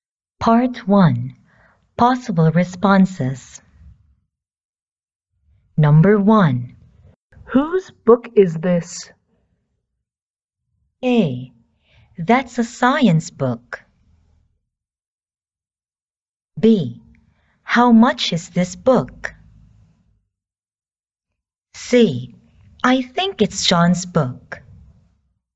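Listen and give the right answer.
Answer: C: I think it's Sean's book.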